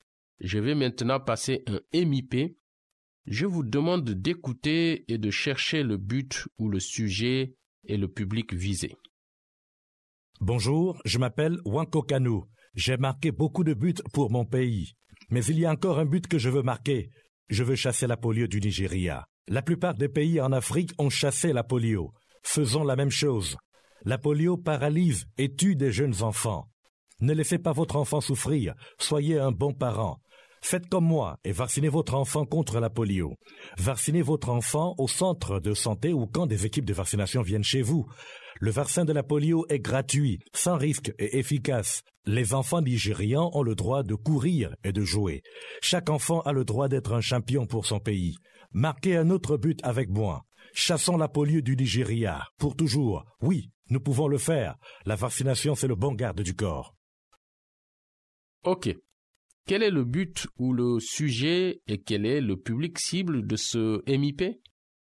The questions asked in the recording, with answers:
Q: Quel est le but ou le sujet et quel est le public cible de ce MIP?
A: Le but, c'est que les parents vaccinent leurs enfants contre la polio.